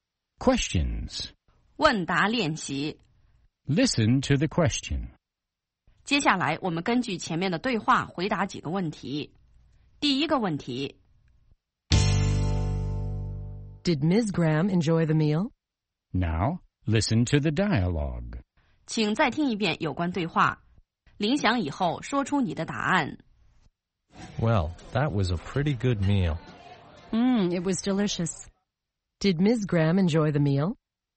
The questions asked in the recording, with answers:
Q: Did Ms. Graham enjoy the meal?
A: Yes, she did. She thought it was delicious.